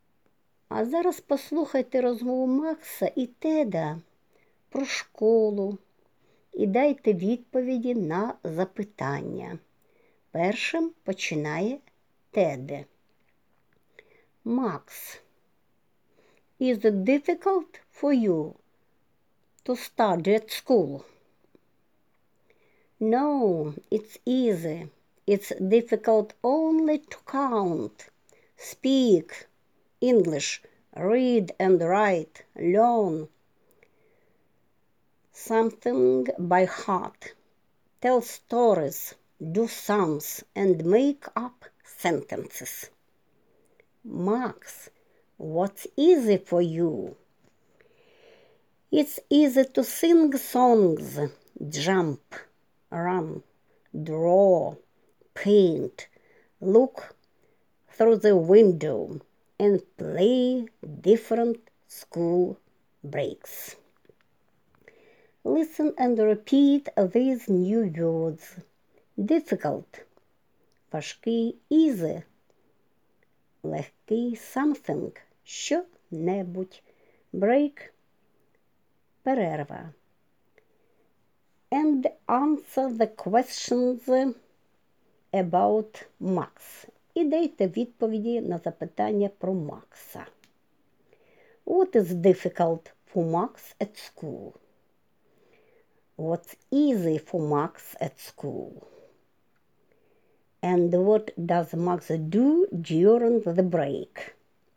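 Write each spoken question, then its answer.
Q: What is difficult for Max at school?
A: To count, speak English, read and write, learn something by heart, tell stories, do sums and make up sentences

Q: What's easy for Max at school?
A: To sing songs, jump, run, draw, paint and look through the window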